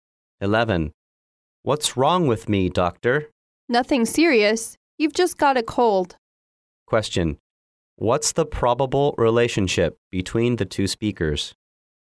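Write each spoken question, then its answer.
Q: What's the probable relationship between the two speakers?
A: Doctor and patient.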